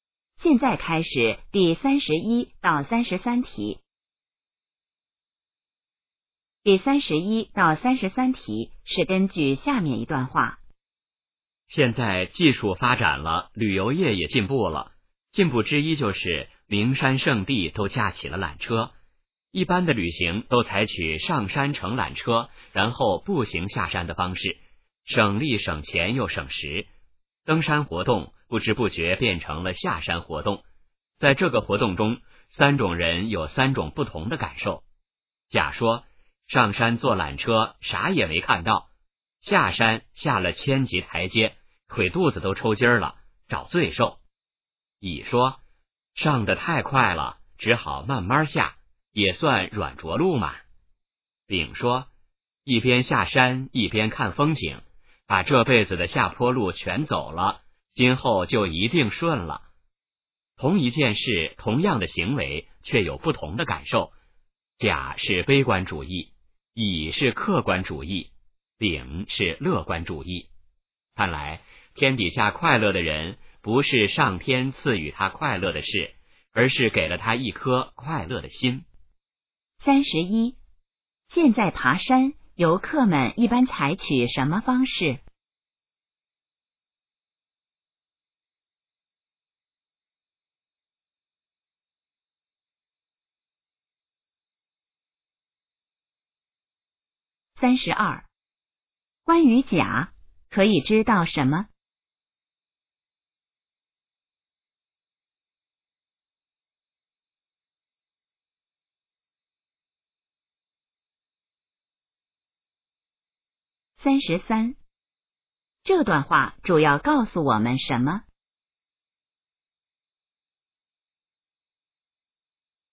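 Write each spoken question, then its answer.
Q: 现在爬山,游客们一般采取什么方式?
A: 上山乘缆车,步行下山

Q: 关于甲,可以知道什么?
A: 他是悲观主义者,觉得是找罪受

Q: 这段话主要告诉我们什么?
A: 快乐取决于有一颗快乐的心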